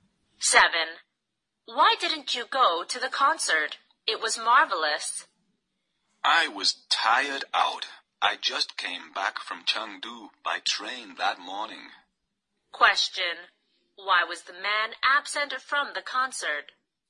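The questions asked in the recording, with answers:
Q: Why was the man absent from the concert?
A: He was very tired from a train trip back from Chengdu.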